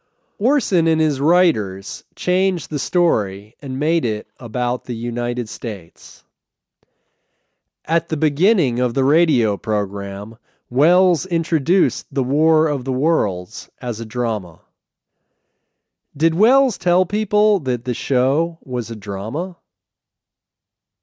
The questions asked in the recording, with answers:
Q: Did Welles tell people that the show was a drama?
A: Yes. At the beginning of the program, Wells told people that the show was a drama.